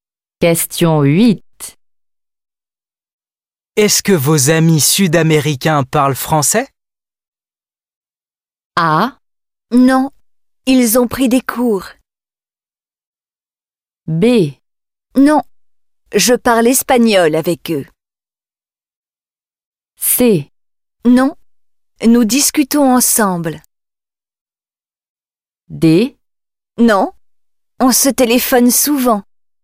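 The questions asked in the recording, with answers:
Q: Est-ce que vos amis sud-américains parlent français?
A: B: Non, je parle espagnol avec eux.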